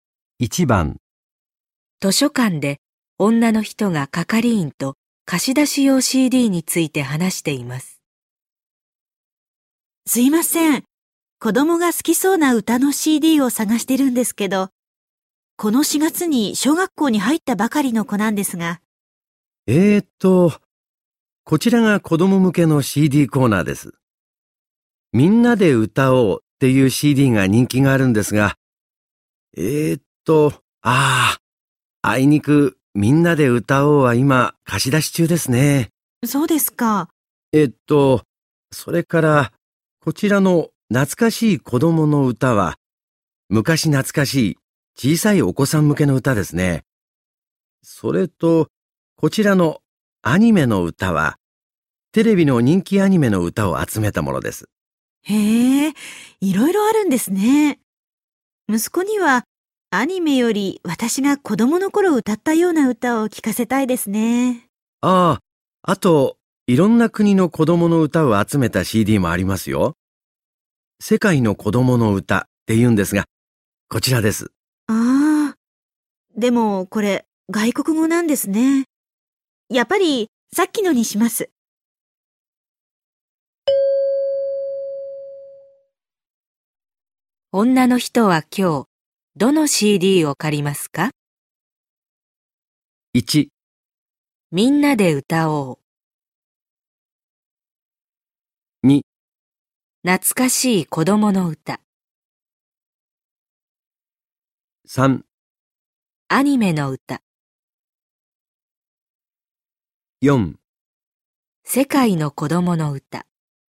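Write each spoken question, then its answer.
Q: 女の人は今日、どの CD を借りますか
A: 2: 懐かしい子供の歌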